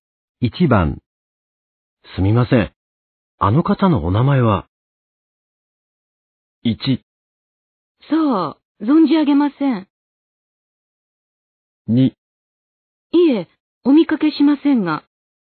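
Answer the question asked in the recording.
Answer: 1: 存じ上げません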